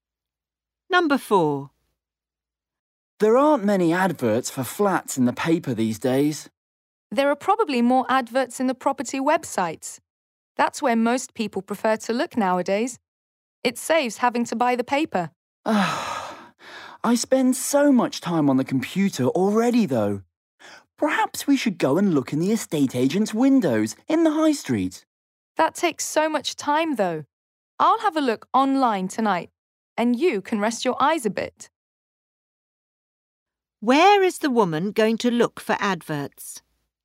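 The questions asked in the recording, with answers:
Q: Where is the woman going to look for adverts?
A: Online, on property websites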